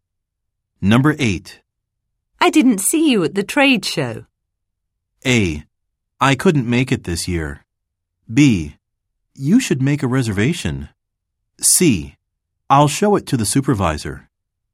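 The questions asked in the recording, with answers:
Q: I didn't see you at the trade show.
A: A: I couldn't make it this year.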